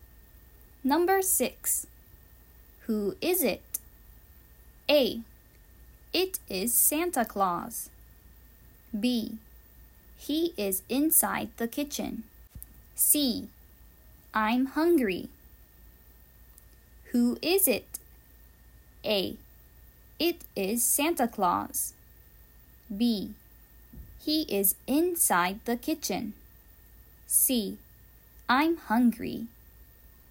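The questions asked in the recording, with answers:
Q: Who is it?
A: A: It is Santa Claus.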